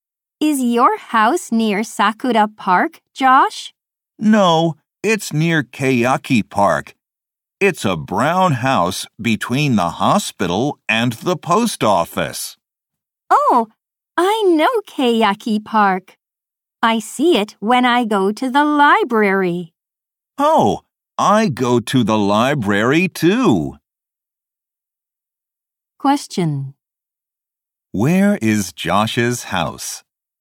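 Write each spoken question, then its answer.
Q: Where is Josh's house?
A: Near Keiaki Park, between the hospital and the post office.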